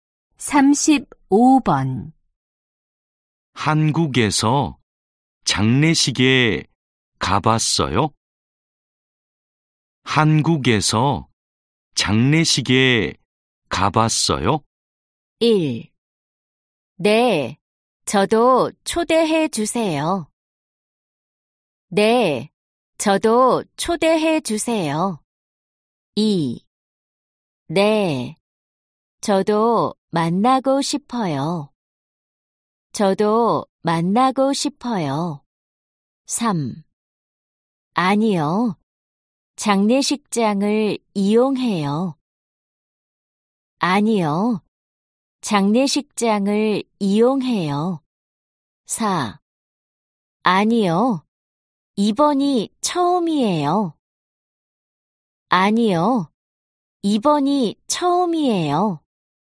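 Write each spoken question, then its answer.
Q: 한국에서 장례식에 가봤어요?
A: 4: 아니요. 이번이 처음이에요.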